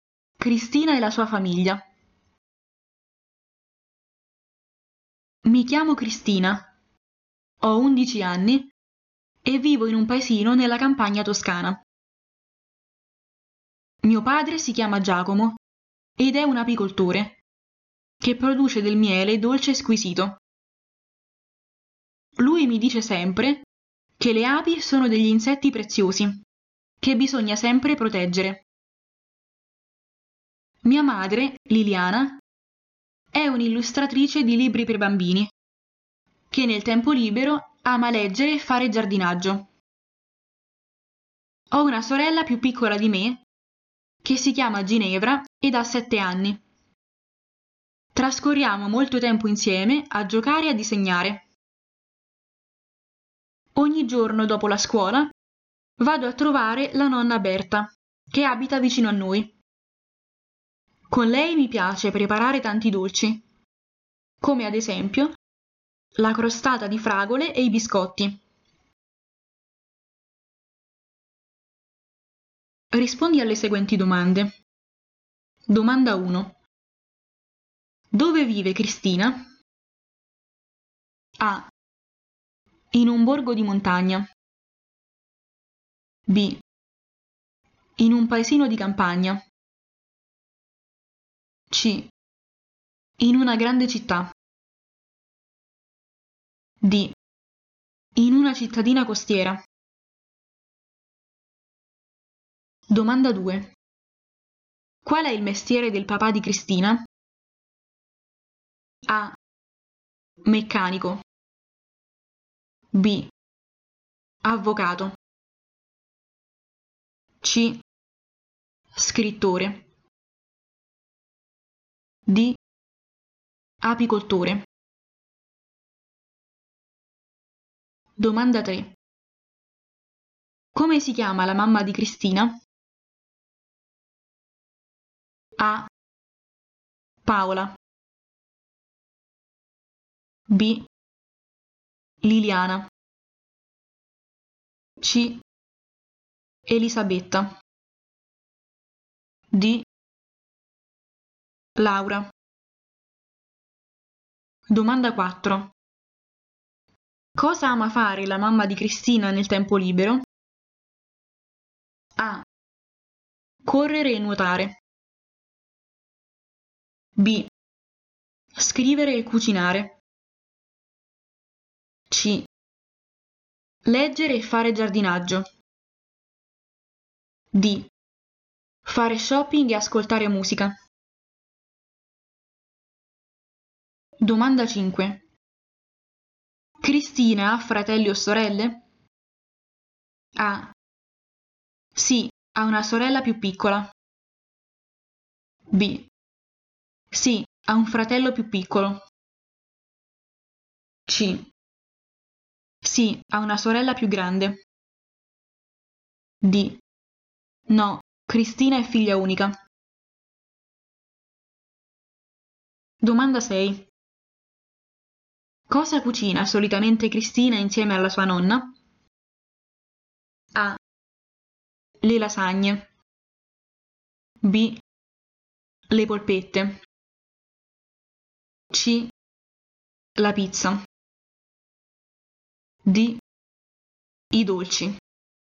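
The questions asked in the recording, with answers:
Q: Dove vive Cristina?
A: B: In un paesino di campagna.

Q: Qual è il mestiere del papà di Cristina?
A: D: Apicoltore.

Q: Come si chiama la mamma di Cristina?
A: B: Liliana.

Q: Cosa ama fare la mamma di Cristina nel tempo libero?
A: C: Leggere e fare giardinaggio.

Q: Cristina ha fratelli o sorelle?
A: A: Sì, ha una sorella più piccola.

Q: Cosa cucina solitamente Cristina insieme alla sua nonna?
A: D: I dolci.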